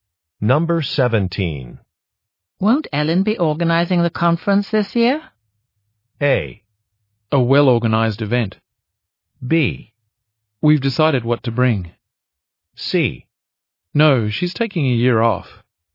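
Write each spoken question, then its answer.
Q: Won't Ellen be organizing the conference this year?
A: C: No, she's taking a year off.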